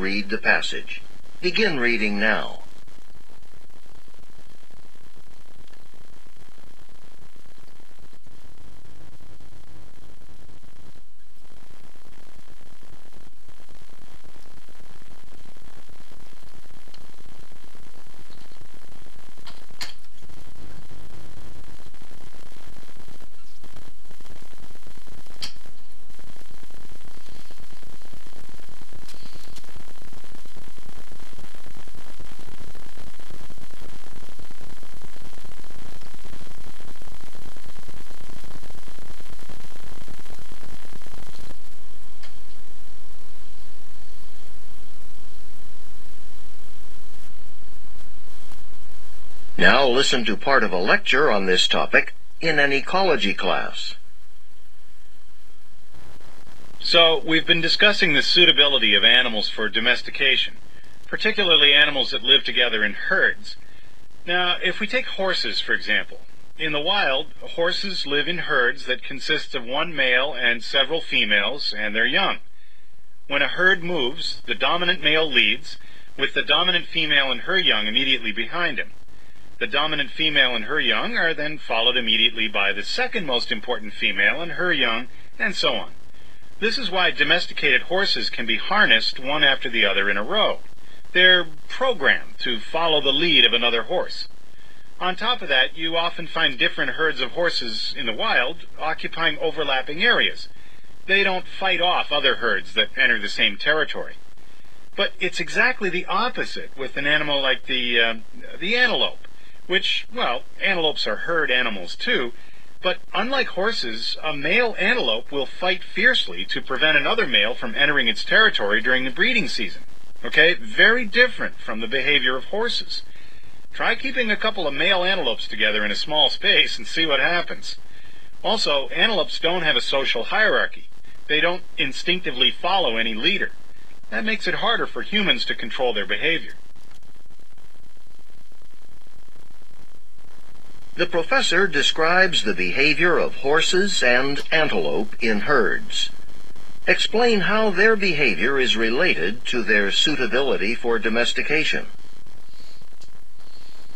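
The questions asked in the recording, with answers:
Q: The professor describes the behavior of horses and antelope in herds. Explain how their behavior is related to their suitability for domestication.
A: Horses are easy to domesticate: they follow a leader in a social hierarchy and don't fight other herds. Antelopes are hard to domesticate: males fight fiercely over territory and they have no hierarchy or leader to follow.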